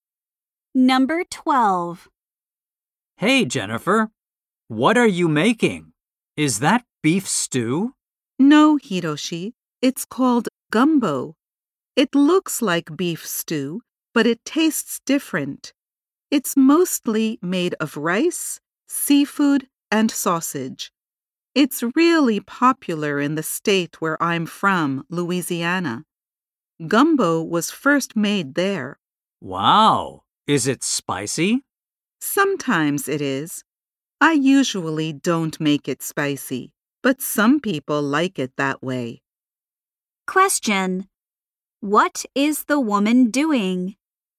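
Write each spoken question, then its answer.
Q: What is the woman doing?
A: Making gumbo.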